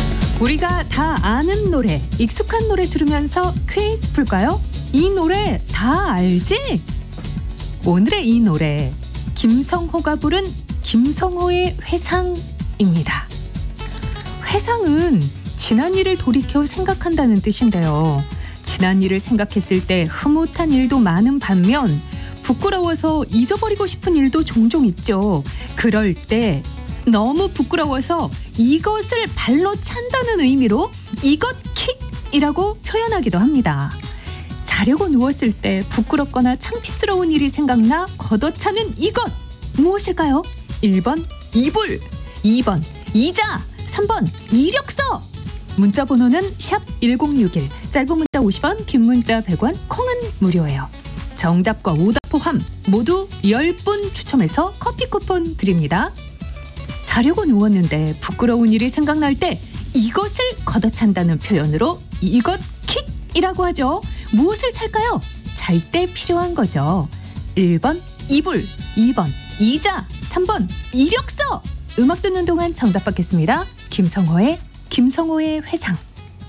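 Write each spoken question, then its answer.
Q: 자려고 누웠을 때 부끄럽거나 창피스러운 일이 생각나 걷어차는 이것 무엇일까요?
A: 1: 이불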